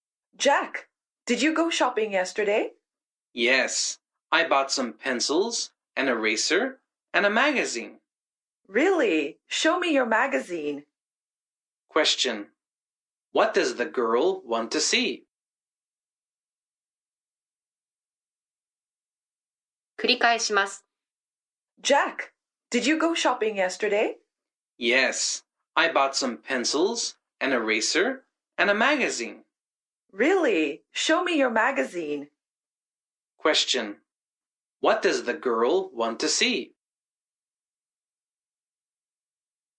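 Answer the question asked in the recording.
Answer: Jack's magazine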